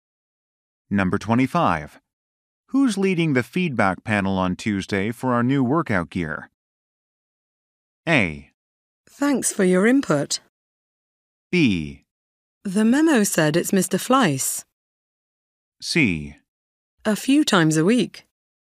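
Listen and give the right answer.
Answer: B: The memo said it's Mr. Fleiss.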